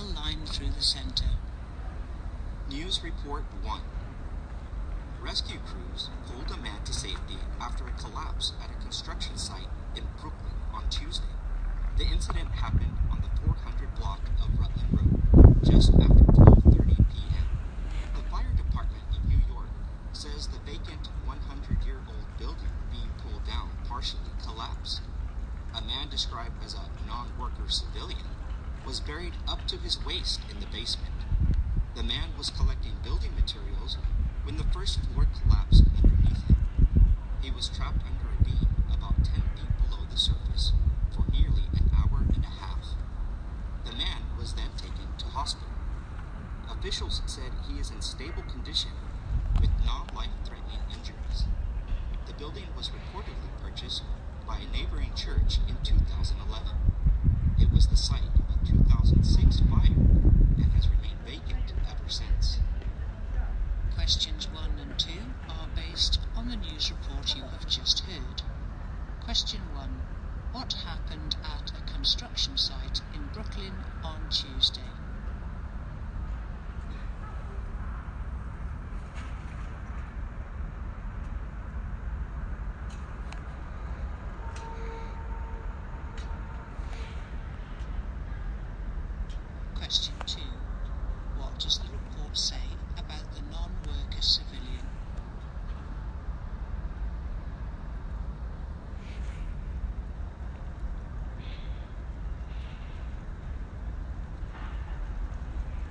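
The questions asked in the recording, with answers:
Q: What happened at a construction site in Brooklyn on Tuesday?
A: A vacant old building being pulled down partially collapsed, trapping a man.

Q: What does the report say about the non-worker civilian?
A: He was trapped for nearly an hour and a half, but is in stable condition with non-life-threatening injuries.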